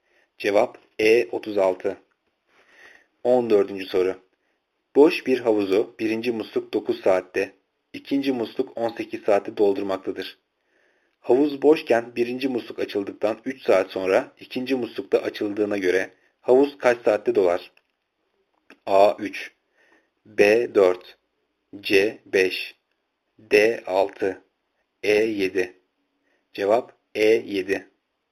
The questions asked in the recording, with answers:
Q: muslukta açıldığına göre havuz kaç saatte dolar?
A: Cevap E 7.